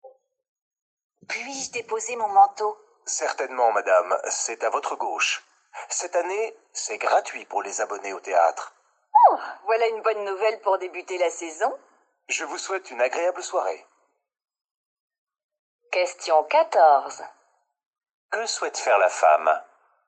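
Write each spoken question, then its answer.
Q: Que souhaite faire la femme ?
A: Déposer son manteau (au vestiaire)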